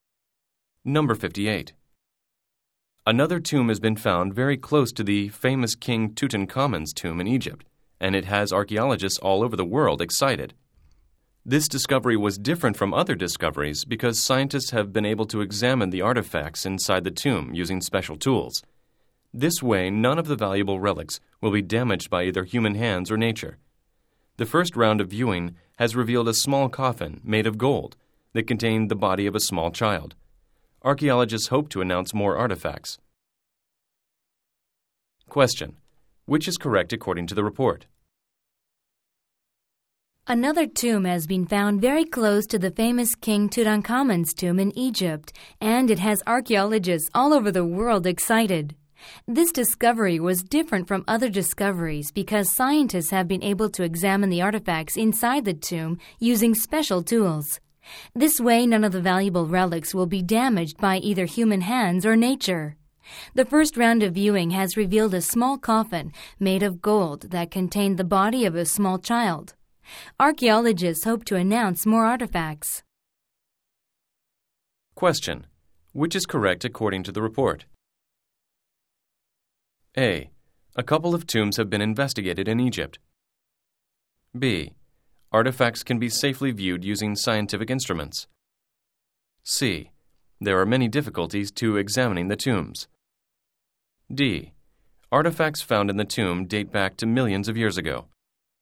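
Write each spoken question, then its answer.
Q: Which is correct according to the report?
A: B: Artifacts can be safely viewed using scientific instruments.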